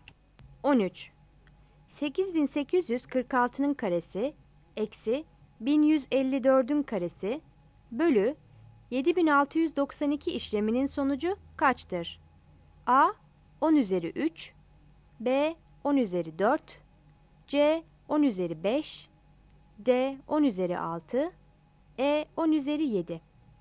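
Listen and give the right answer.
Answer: B: 10 üzeri 4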